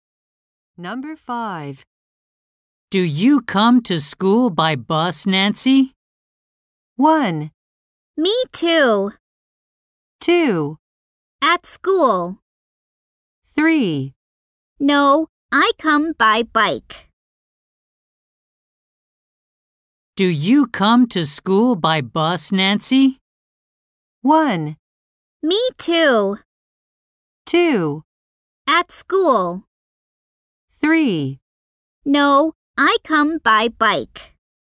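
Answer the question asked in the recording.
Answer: 3: No, I come by bike.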